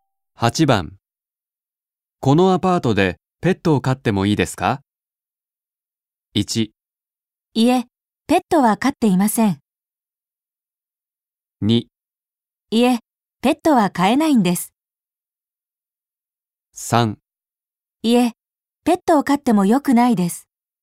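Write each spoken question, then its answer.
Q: このアパートでペットを飼ってもいいですか?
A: 2: いえ、ペットは飼えないんです。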